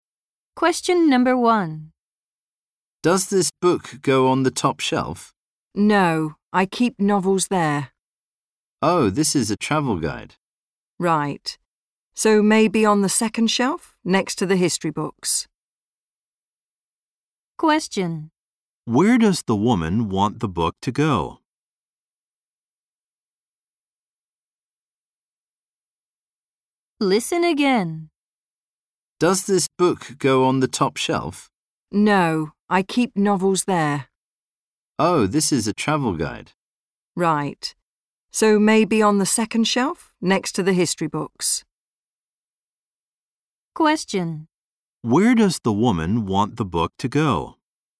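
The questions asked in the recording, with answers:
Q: Where does the woman want the book to go?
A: On the second shelf, next to the history books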